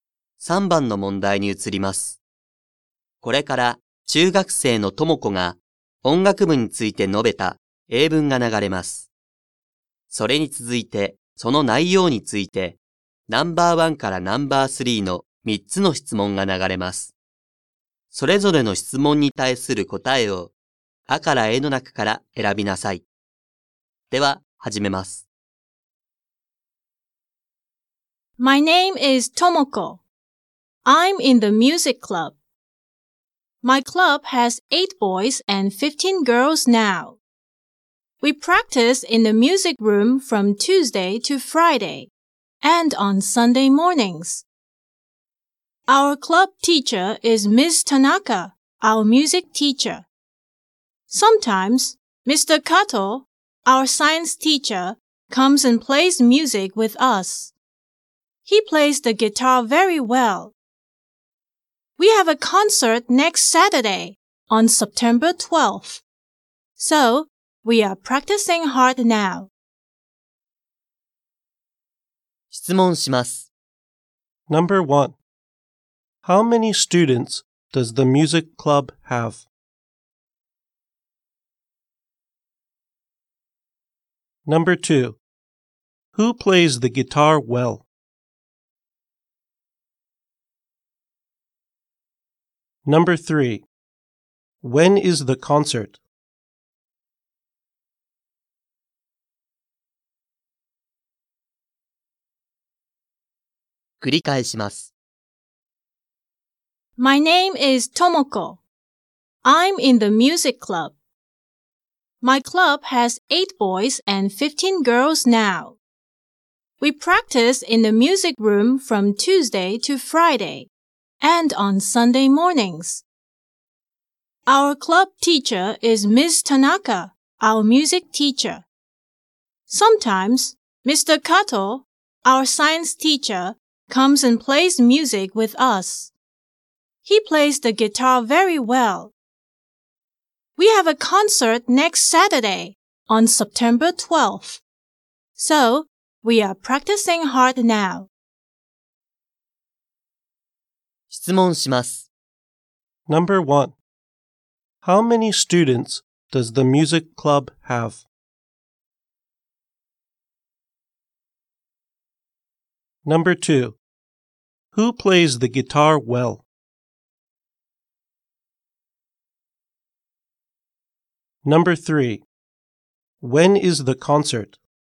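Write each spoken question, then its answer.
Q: How many students does the music club have?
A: 23 students

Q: Who plays the guitar well?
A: Mr. Kato

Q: When is the concert?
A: Next Saturday, September 12th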